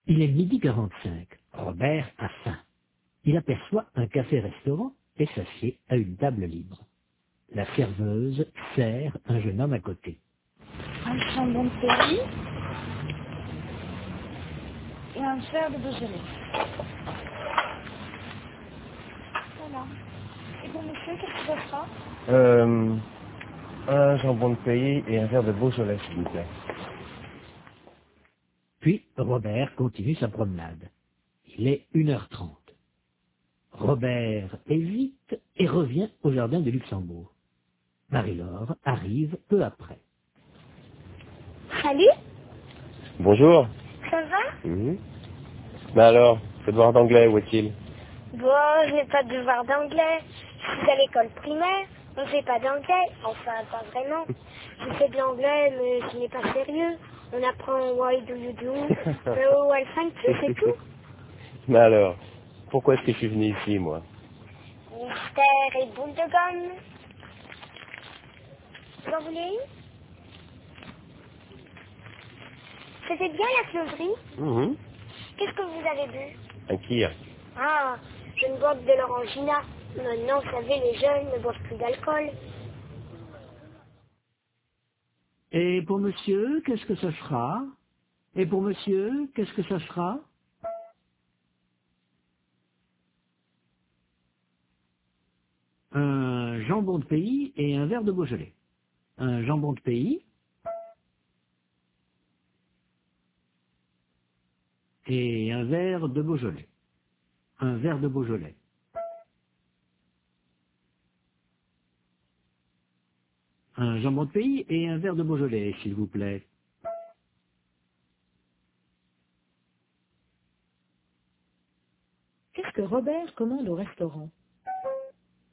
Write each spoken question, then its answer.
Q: Qu'est-ce que Robert commande au restaurant?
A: Un jambon de pays et un verre de Beaujolais.